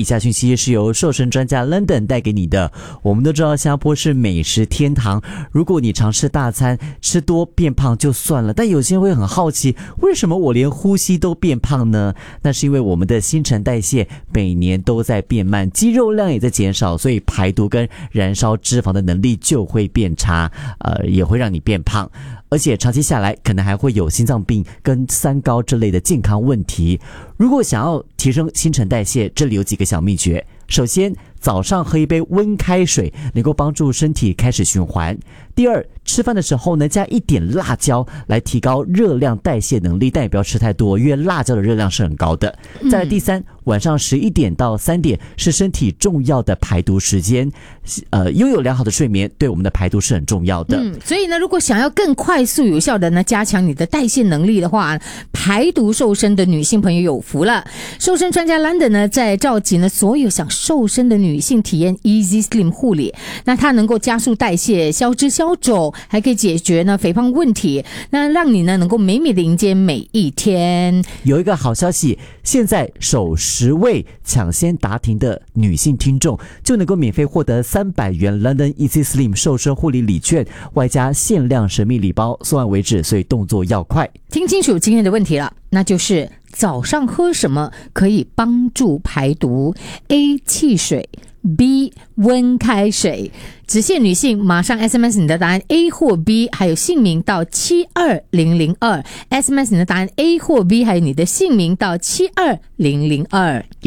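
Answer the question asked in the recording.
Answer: B: 温开水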